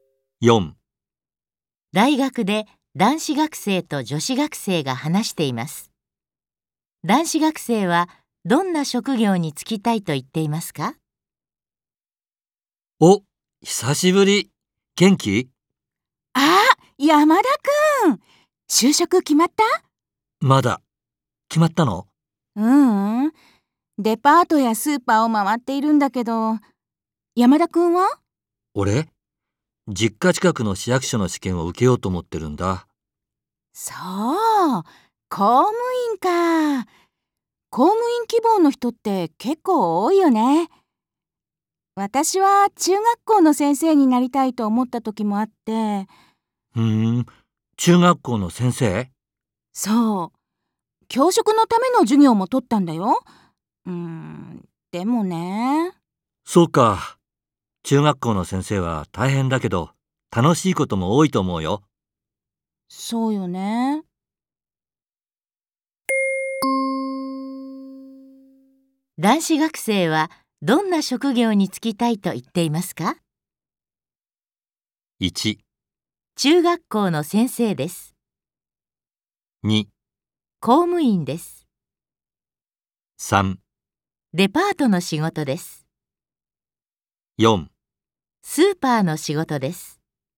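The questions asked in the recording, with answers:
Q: 男子学生はどんな職業に就きたいと言っていますか?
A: 2: 公務員です。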